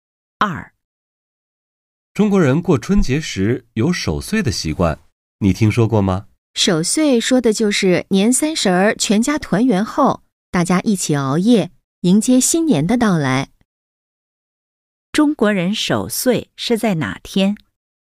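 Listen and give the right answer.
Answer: 年三十儿(除夕)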